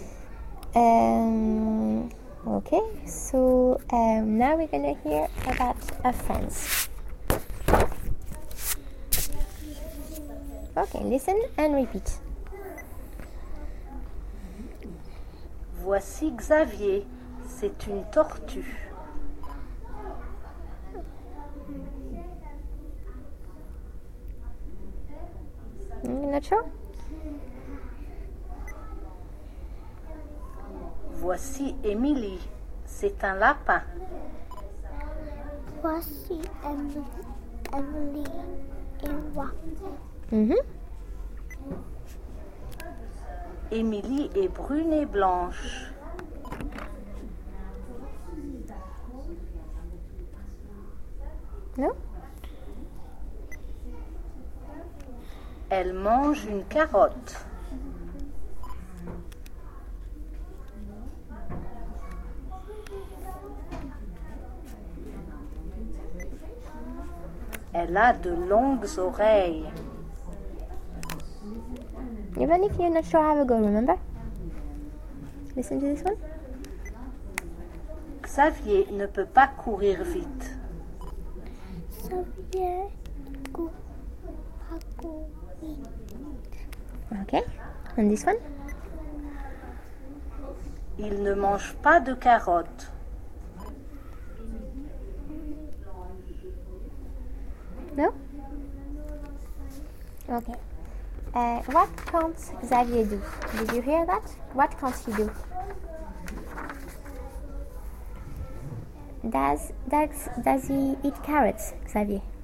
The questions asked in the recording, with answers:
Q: Does he eat carrots, Xavier?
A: No, he doesn't.